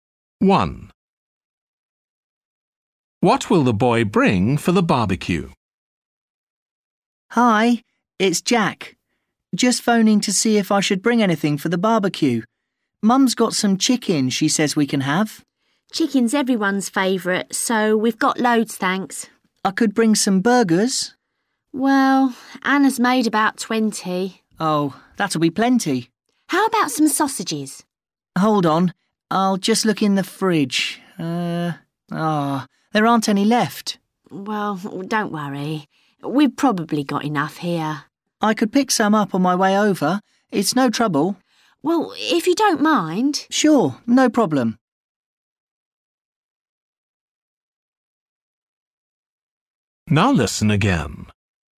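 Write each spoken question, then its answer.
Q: What will the boy bring for the barbecue?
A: sausages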